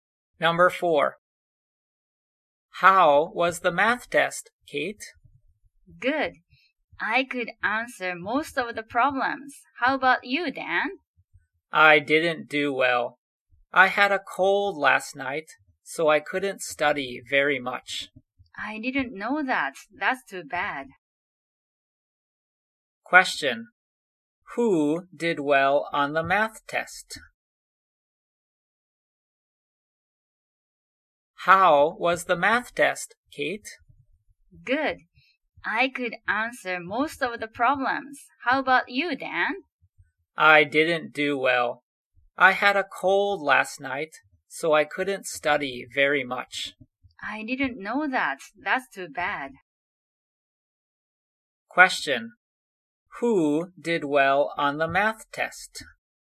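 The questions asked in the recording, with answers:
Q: Who did well on the math test?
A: Kate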